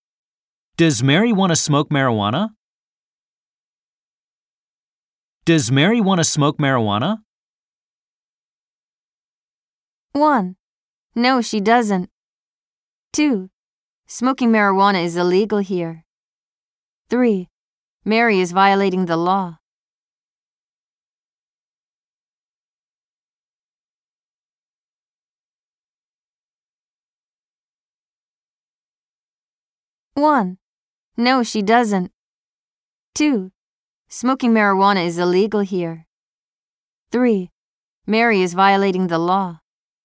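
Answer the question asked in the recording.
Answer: 1: No, she doesn't.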